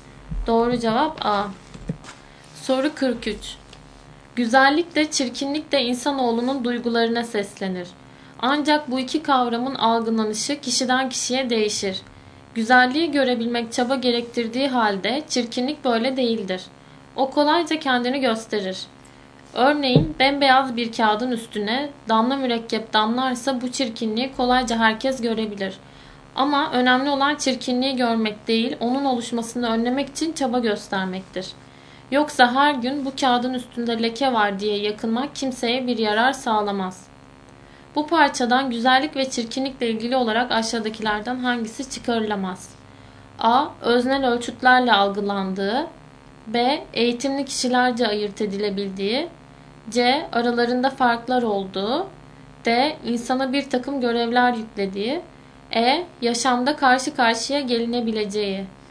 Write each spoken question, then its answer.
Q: Bu parçadan güzellik ve çirkinlikle ilgili olarak aşağıdakilerden hangisi çıkarılamaz?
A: Doğru cevap B.